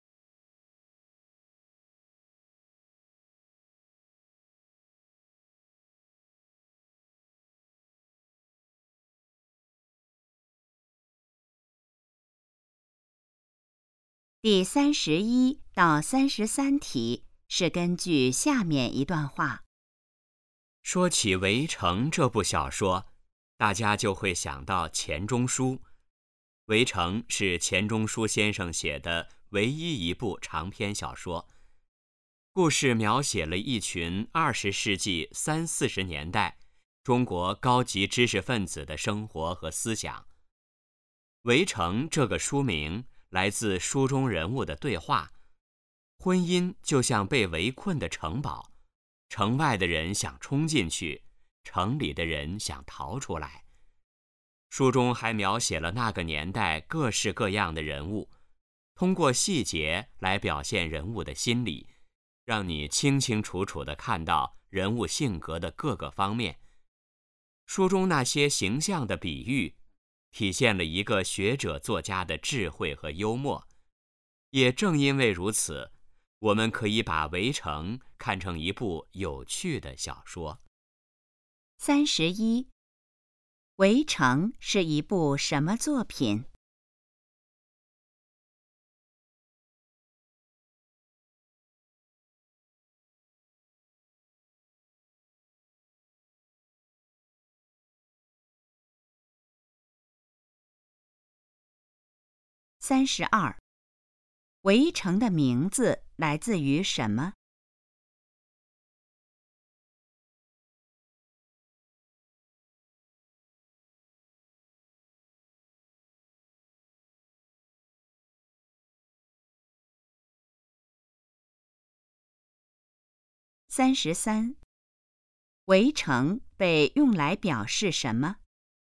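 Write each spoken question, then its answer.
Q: 《围城》是一部什么作品?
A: 长篇小说

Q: 《围城》的名字来自于什么?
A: 书中人物的对话

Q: 《围城》被用来表示什么?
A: 婚姻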